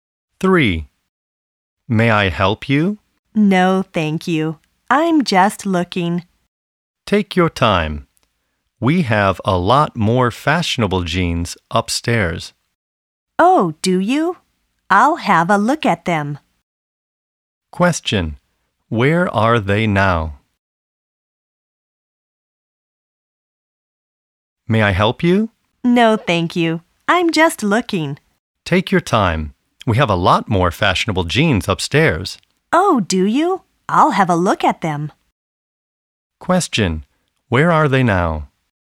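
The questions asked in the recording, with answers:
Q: Where are they now?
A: In a clothes store (jeans shop).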